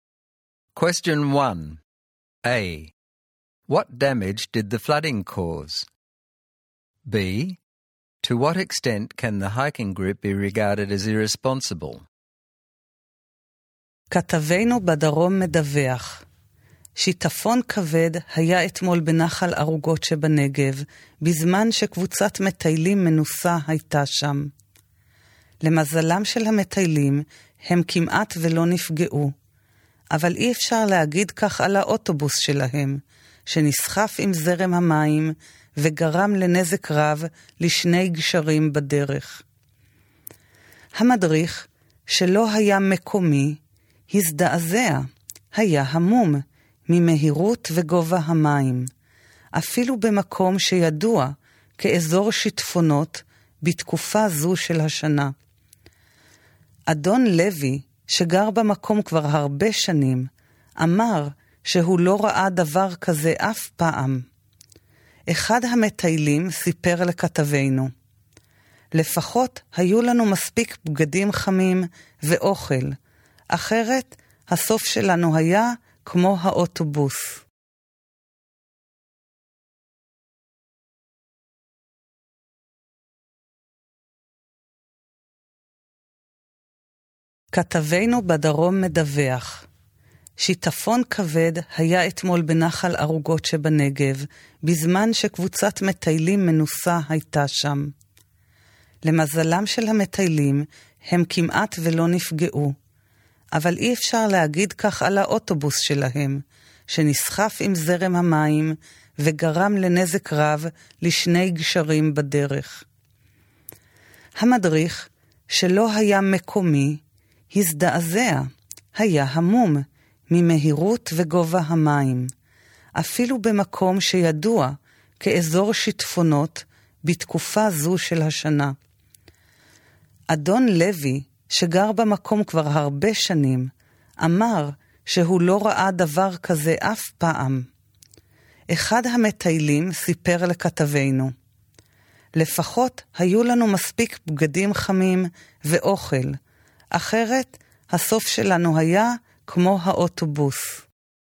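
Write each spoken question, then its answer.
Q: What damage did the flooding cause?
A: The hikers' bus was swept away by the water and caused heavy damage to two bridges.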